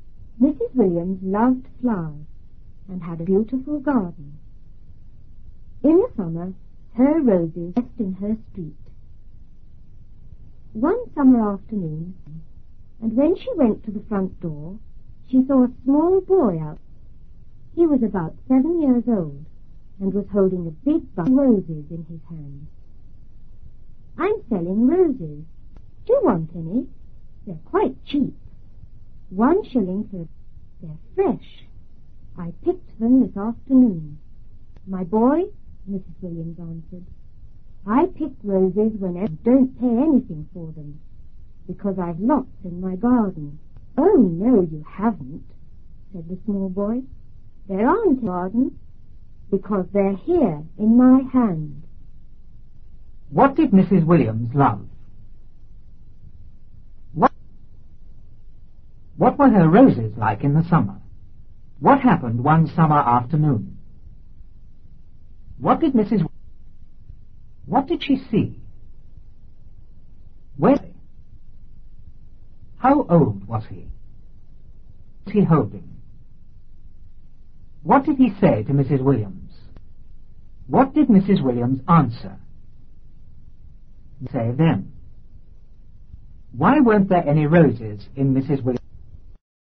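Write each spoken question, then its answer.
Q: What did Mrs. Williams love?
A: Flowers

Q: What did she see?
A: A small boy

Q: How old was he?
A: About 7 years old

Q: What was he holding?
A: A big bunch of roses

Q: What did Mrs. Williams answer?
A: She didn't pay for roses because she had lots in her garden

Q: Why weren't there any roses in Mrs. Williams?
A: Because the boy had picked them; they were in his hand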